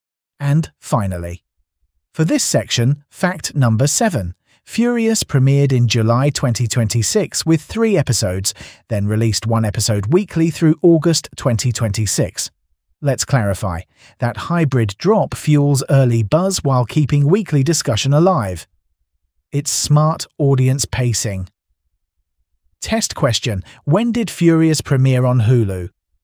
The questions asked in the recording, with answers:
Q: when did Furious premiere on Hulu?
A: July 2026.